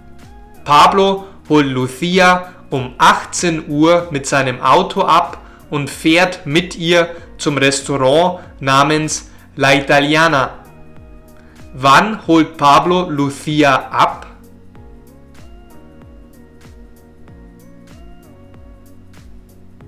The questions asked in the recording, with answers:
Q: Wann holt Pablo Lucia ab?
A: Um 18 Uhr. Pablo holt Lucia um 18 Uhr mit seinem Auto ab.